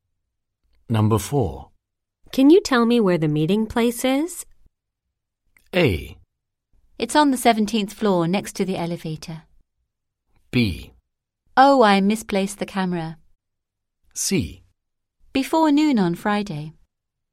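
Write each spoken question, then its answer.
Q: Can you tell me where the meeting place is?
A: A: It's on the 17th floor next to the elevator.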